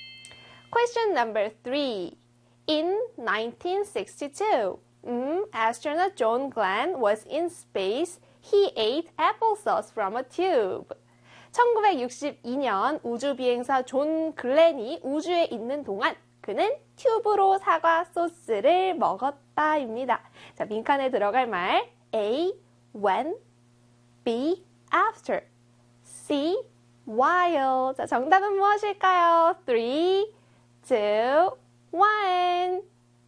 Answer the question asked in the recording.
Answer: C에 while